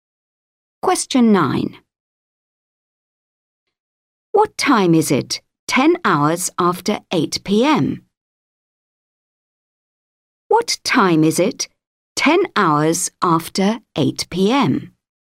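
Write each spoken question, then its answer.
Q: What time is it 10 hours after 8 PM?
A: 6 AM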